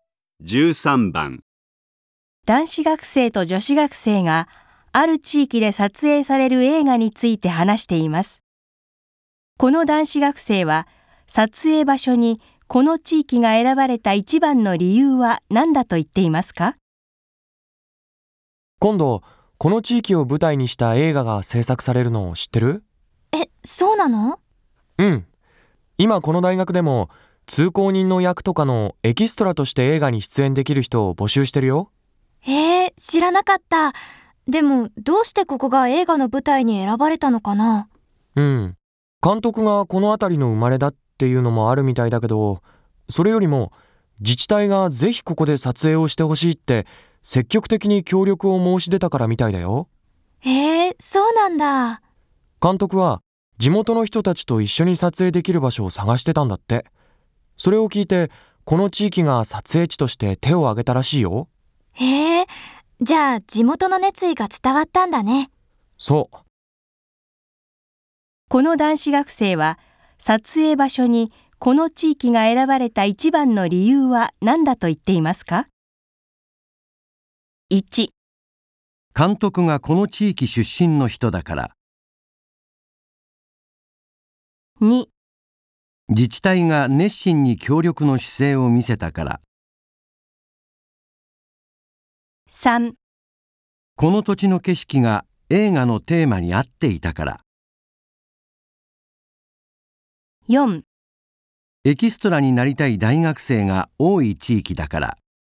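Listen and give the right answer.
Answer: 2: 自治体が熱心に協力の姿勢を見せたから。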